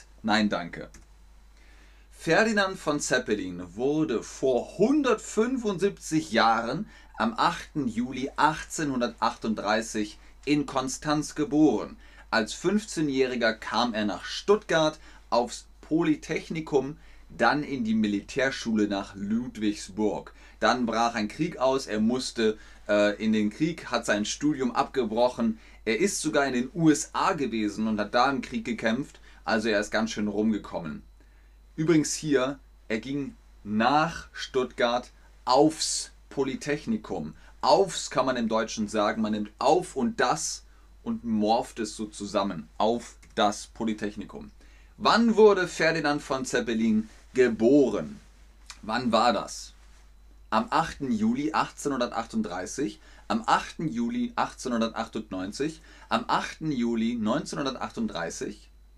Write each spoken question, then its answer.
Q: Wann wurde Ferdinand von Zeppelin geboren?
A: Richtig, am 8. Juli 1838 wurde Graf oder Ferdinand Graf von Zeppelin geboren.